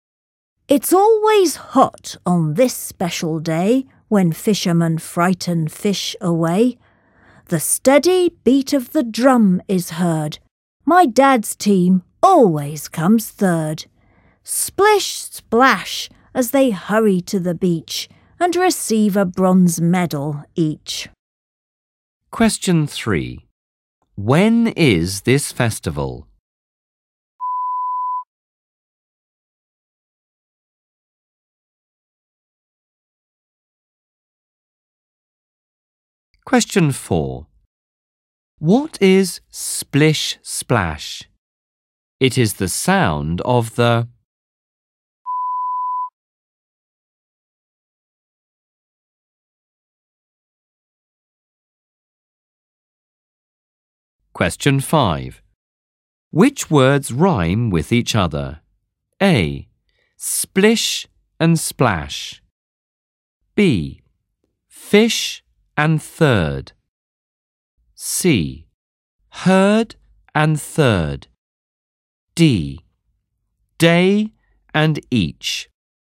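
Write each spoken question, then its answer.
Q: Which words rhyme with each other?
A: C: Herd and third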